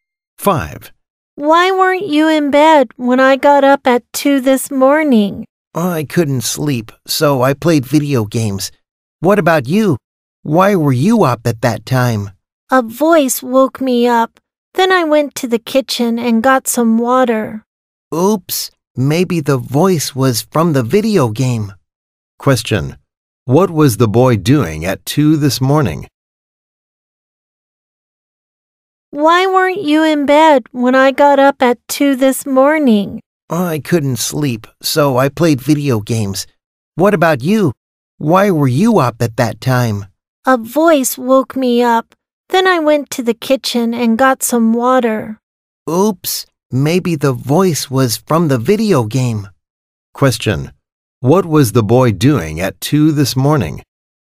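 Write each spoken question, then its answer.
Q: Question, what was the boy doing at 2 this morning?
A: Playing video games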